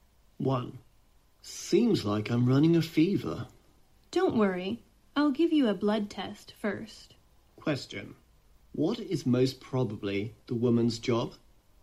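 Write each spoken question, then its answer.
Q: What is most probably the woman's job?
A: A doctor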